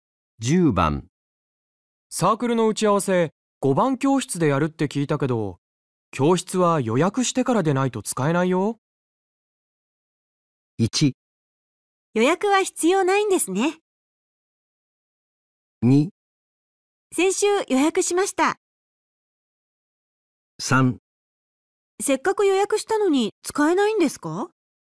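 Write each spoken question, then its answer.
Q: サークルの打ち合わせ5番教室でやるって聞いたけど教室は予約してからでないと使えないよ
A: 2: 先週予約しました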